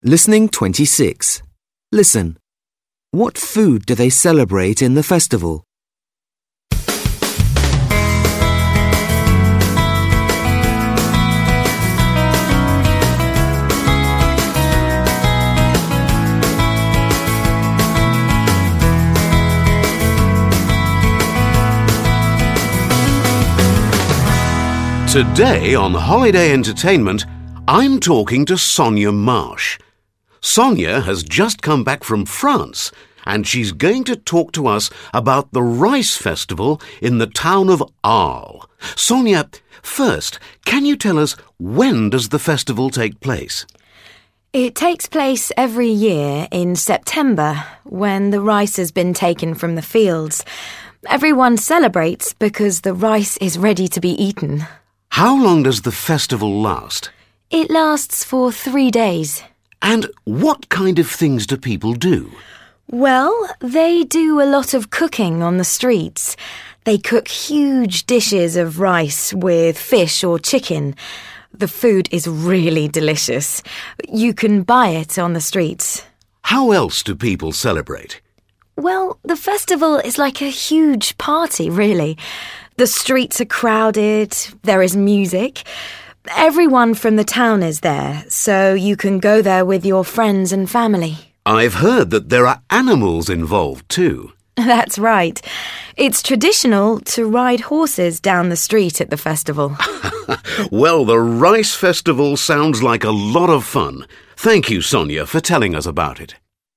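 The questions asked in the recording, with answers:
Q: What food do they celebrate in the festival?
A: Rice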